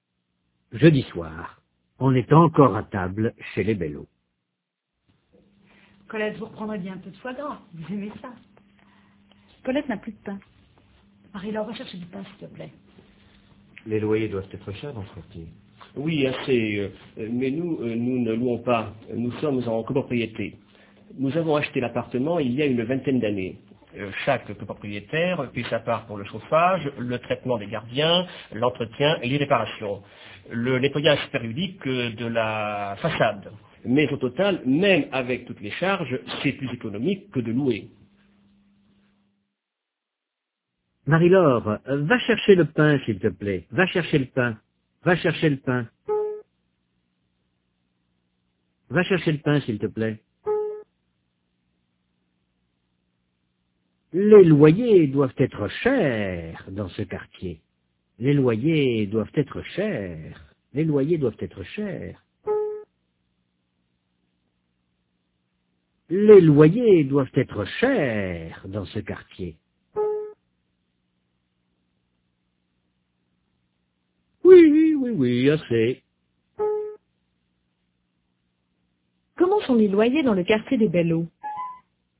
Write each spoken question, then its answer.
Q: Comment sont les loyers dans le quartier des Bello?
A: Assez cher.